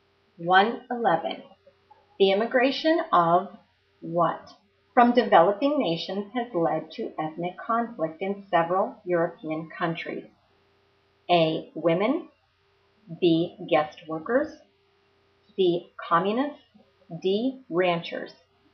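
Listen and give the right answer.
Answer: B: Guest workers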